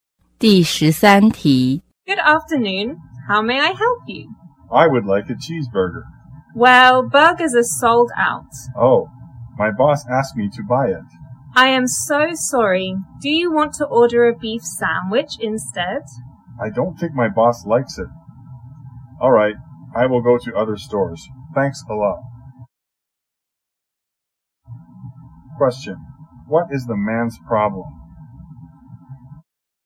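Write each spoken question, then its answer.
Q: What is the man's problem?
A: Burgers are sold out, so he can't buy the cheeseburger his boss wanted.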